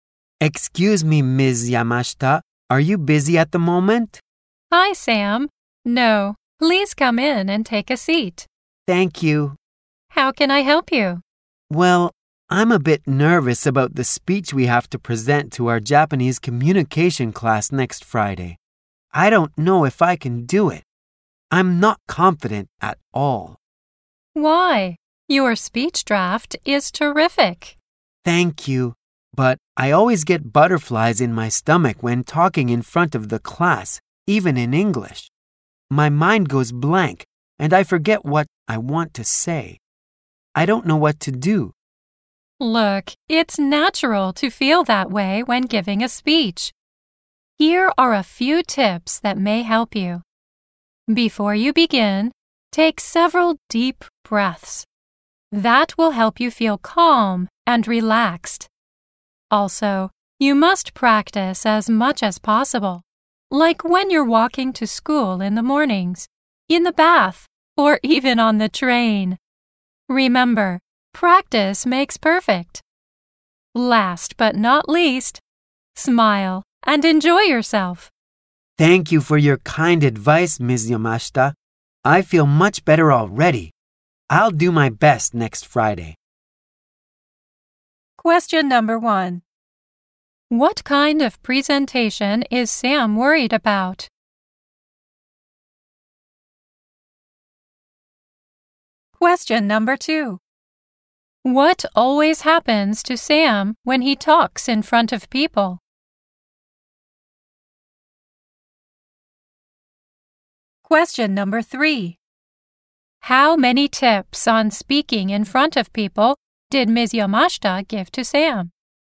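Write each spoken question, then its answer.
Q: What kind of presentation is Sam worried about?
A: A speech for his Japanese communication class next Friday

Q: What always happens to Sam when he talks in front of people?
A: He gets nervous, his mind goes blank and he forgets what he wants to say

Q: How many tips on speaking in front of people did Ms. Yamashita give to Sam?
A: Three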